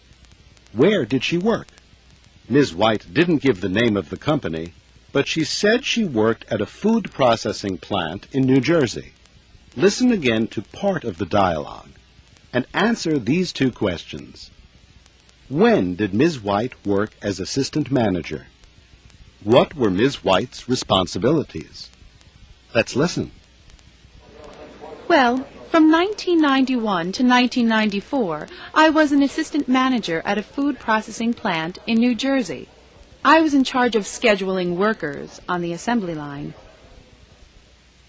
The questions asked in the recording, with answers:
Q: When did Ms. White work as assistant manager?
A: She was assistant manager from 1991 to 1994.

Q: What were Ms. White's responsibilities?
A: She was in charge of scheduling workers.